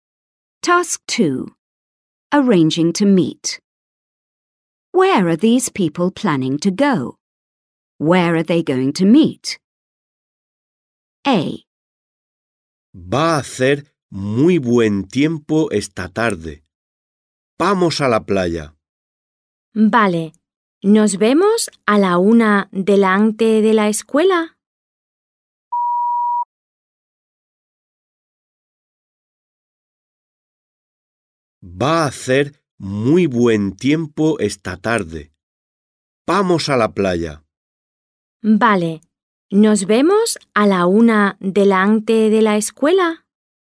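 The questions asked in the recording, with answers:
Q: Where are these people planning to go?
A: To the beach

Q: Where are they going to meet?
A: In front of the school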